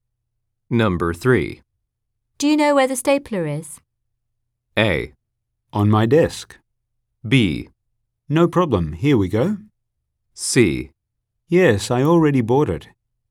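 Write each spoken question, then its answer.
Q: Do you know where the stapler is?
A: A: On my desk.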